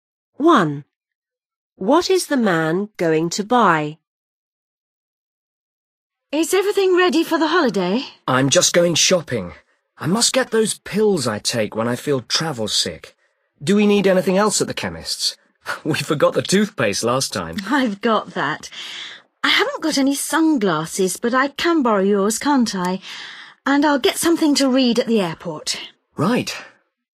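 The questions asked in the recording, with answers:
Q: What is the man going to buy?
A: travel sickness pills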